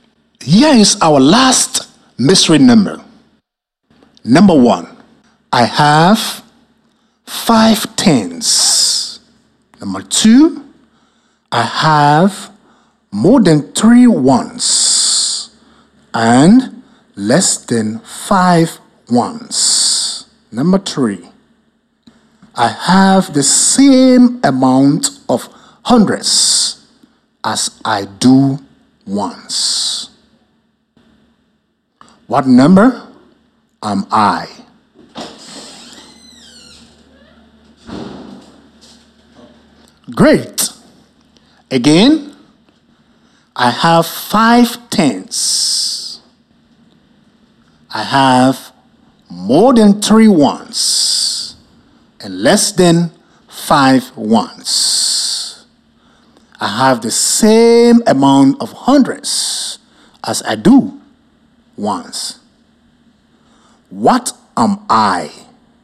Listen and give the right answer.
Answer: The mystery number is 454.